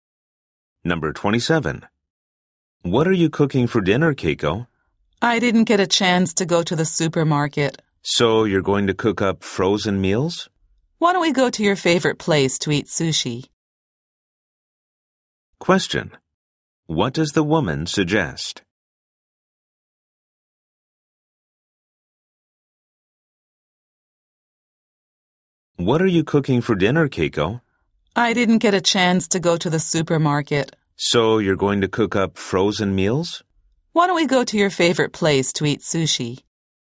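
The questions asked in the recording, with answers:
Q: What does the woman suggest?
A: Going out to eat sushi at his favorite place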